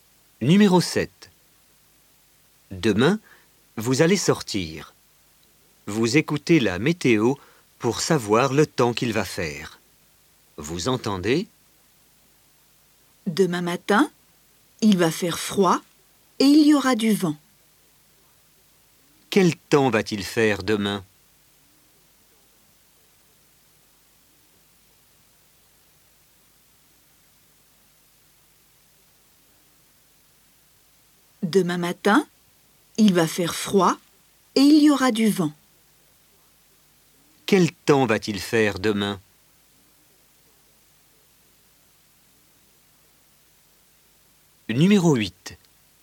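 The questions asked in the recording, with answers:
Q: Quel temps va-t-il faire demain?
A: Il va faire froid et il y aura du vent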